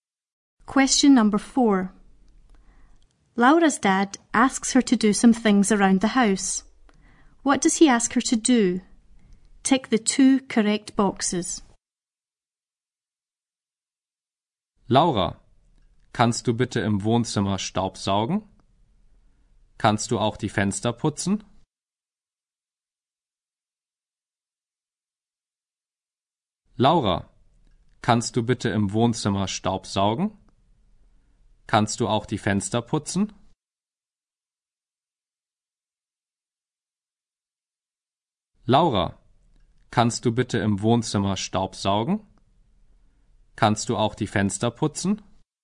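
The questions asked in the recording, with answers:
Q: What does he ask her to do?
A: Vacuum the living room and clean the windows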